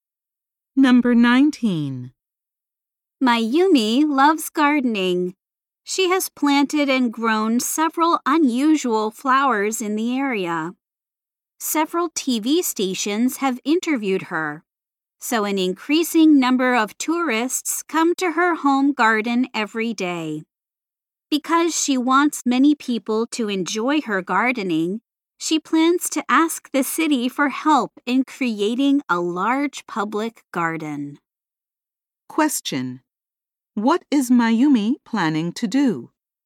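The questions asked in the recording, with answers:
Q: What is Mayumi planning to do?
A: Ask the city for help in creating a large public garden.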